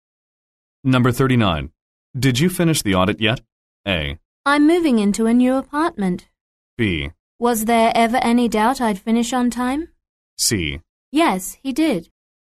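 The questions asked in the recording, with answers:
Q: Did you finish the audit yet?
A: B: Was there ever any doubt I'd finish on time?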